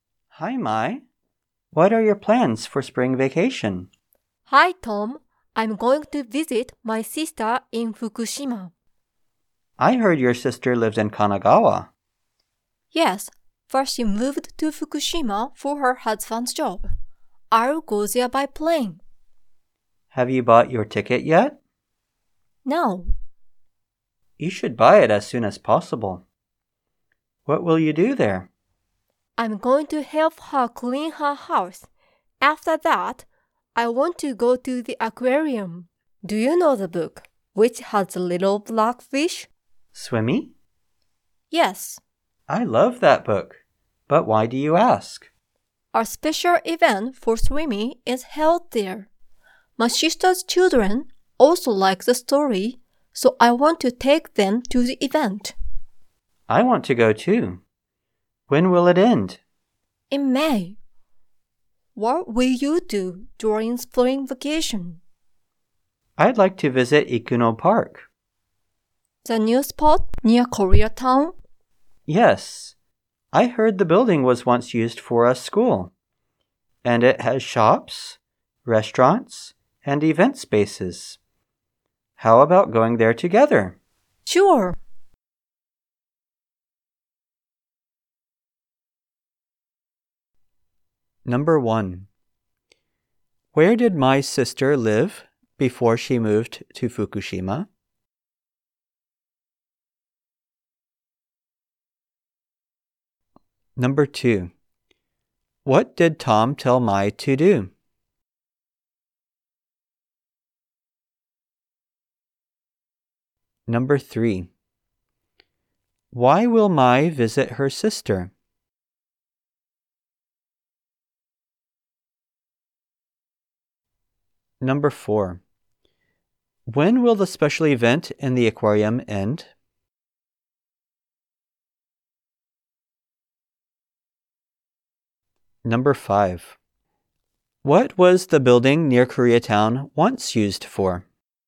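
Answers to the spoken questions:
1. In Kanagawa
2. To buy her plane ticket as soon as possible
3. To help her clean her house
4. In May
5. A school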